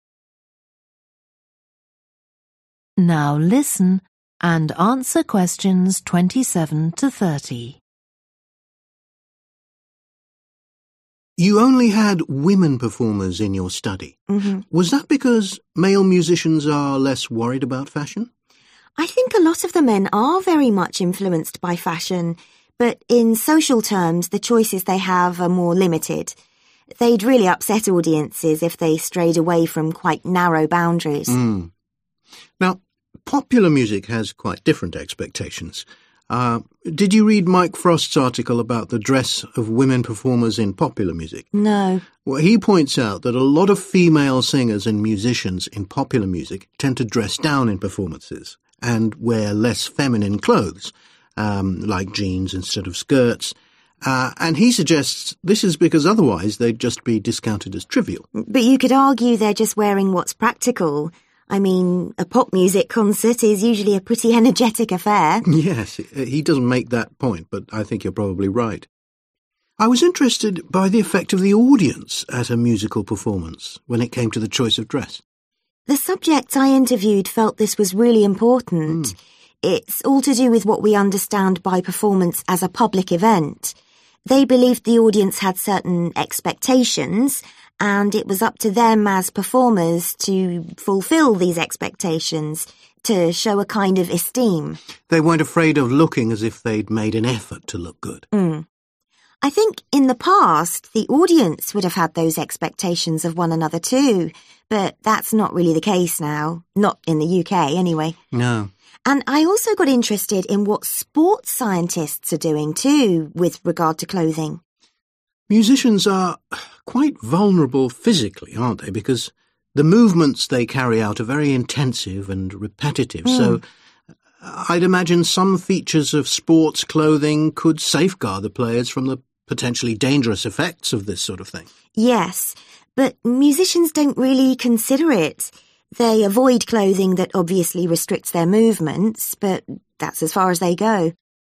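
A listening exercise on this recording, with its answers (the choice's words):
Choose the correct letter, A, B or C.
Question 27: Joanna concentrated on women performers because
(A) women are more influenced by fashion.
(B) women's dress has led to more controversy.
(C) women's code of dress is less strict than men's.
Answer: women's code of dress is less strict than men's.

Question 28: Mike Frost's article suggests that in popular music, women's dress is affected by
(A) their wish to be taken seriously.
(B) their tendency to copy each other.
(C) their reaction to the masculine nature of the music.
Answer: their wish to be taken seriously.

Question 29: What did Joanna's subjects say about the audience at a performance?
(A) The musicians' choice of clothing is linked to respect for the audience.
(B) The clothing should not distract the audience from the music.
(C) The audience should make the effort to dress appropriately.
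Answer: The musicians' choice of clothing is linked to respect for the audience.

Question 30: According to the speakers, musicians could learn from sports scientists about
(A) the importance of clothing for physical freedom.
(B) the part played by clothing in improving performance.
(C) the way clothing may protect against physical injury.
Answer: the way clothing may protect against physical injury.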